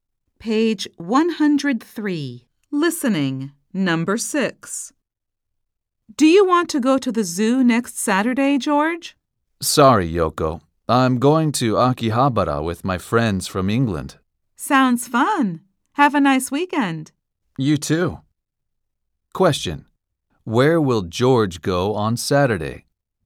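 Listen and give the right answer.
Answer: To Akihabara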